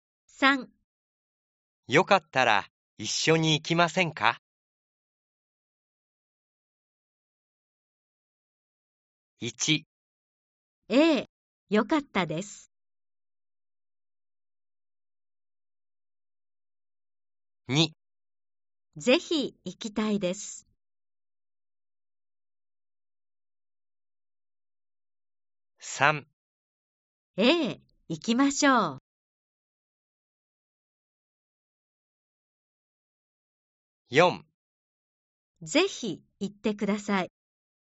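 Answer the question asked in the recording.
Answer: 2: ぜひ行きたいです。 / 3: ええ、行きましょう。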